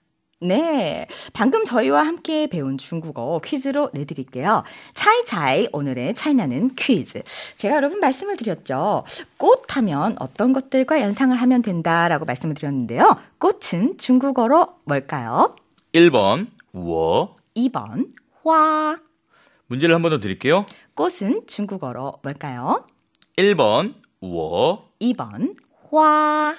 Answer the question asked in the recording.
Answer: 2번 화.